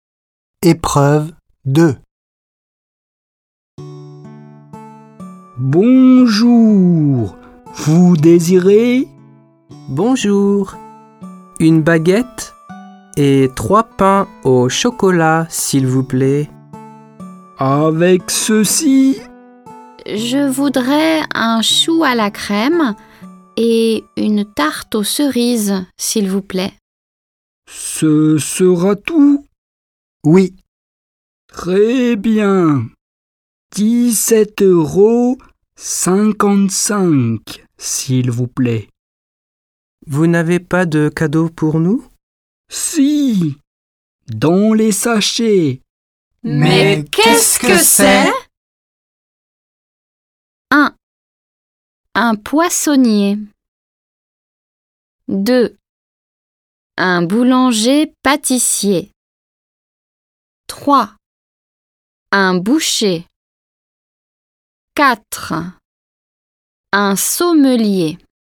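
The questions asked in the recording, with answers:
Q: Mais qu'est-ce que c'est ?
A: 2: Un boulanger pâtissier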